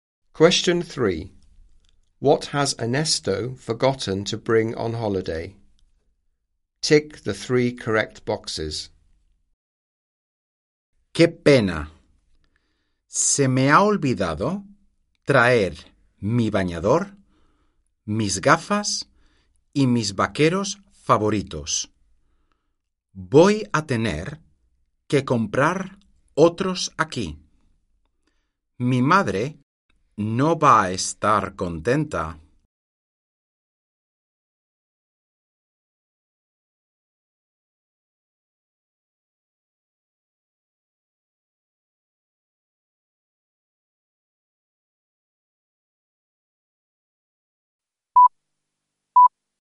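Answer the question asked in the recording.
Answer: His swimsuit, his glasses and his favourite jeans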